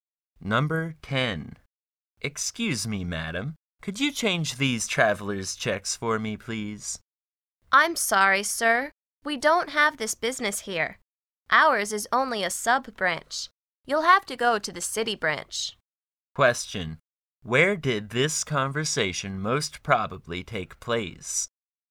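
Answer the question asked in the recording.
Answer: At a bank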